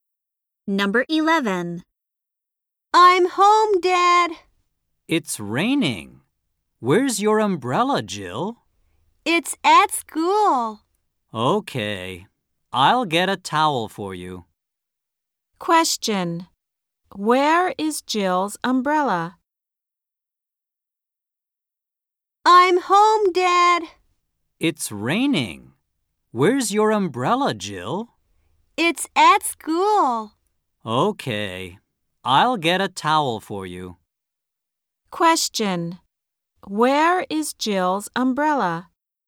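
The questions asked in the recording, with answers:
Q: Where is Jill's umbrella?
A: At school.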